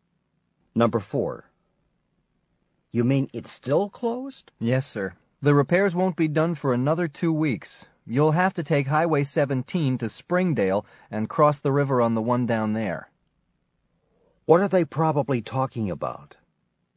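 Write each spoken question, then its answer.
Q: What are they probably talking about?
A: A bridge that is closed for repairs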